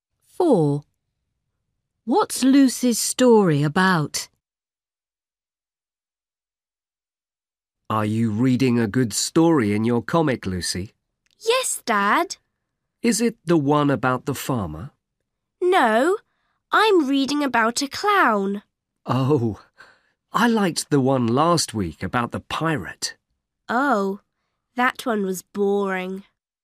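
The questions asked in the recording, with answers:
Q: What's Lucy's story about?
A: a clown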